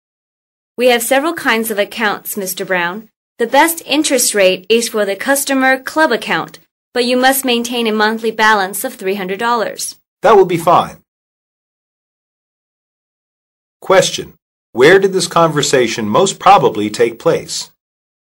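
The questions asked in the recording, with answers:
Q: Where did this conversation most probably take place?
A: At a bank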